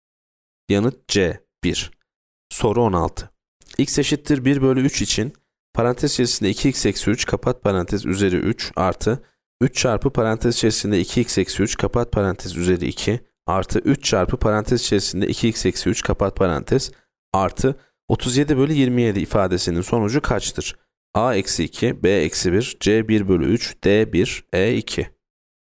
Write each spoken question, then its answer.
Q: X eşittir 1 bölü 3 için parantez içerisinde 2x eksi 3 kapat parantez üzeri 3 artı 3 çarpı parantez içerisinde 2x eksi 3 kapat parantez üzeri 2 artı 3 çarpı parantez içerisinde 2x eksi 3 kapat parantez artı 37 bölü 27 ifadesinin sonucu kaçtır?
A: Yanıt A eksi 2.